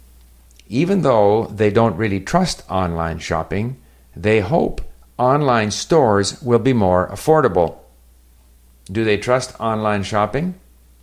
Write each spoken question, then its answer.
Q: Do they trust online shopping?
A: No, they don't really trust online shopping.